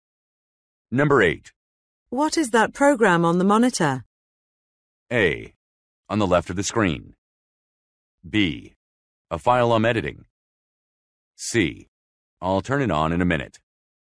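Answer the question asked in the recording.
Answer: B: A file I'm editing.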